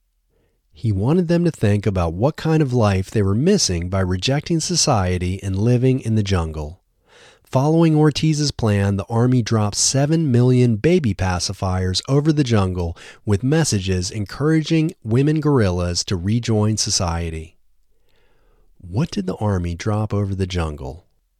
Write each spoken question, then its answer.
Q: What did the army drop over the jungle?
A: The army dropped 7 million baby pacifiers over the jungle.